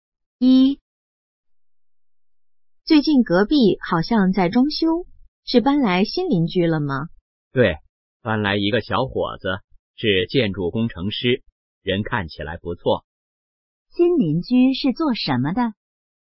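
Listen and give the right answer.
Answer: 建筑工程师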